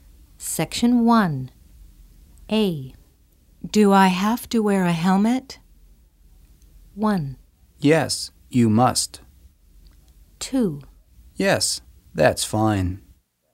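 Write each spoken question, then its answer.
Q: Do I have to wear a helmet?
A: 1: Yes, you must.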